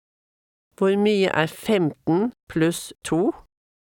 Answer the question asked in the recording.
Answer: 17.